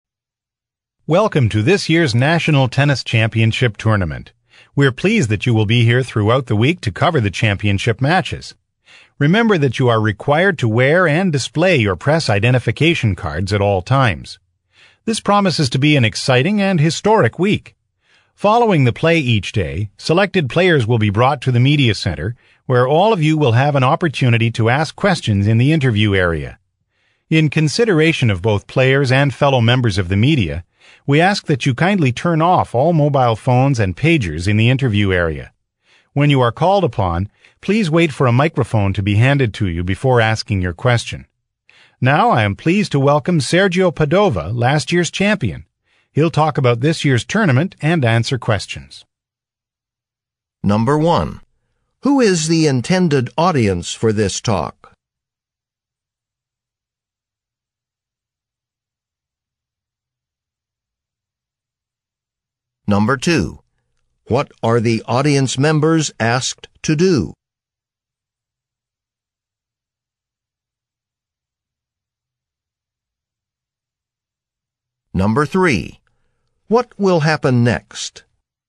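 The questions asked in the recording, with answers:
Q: Who is the intended audience for this talk?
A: Members of the media (reporters)

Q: What will happen next?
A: Last year's champion, Sergio Padova, will talk and answer questions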